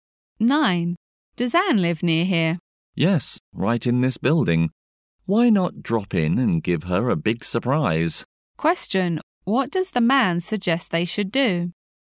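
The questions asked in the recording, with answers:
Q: what does the man suggest they should do?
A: Drop in on Anne and surprise her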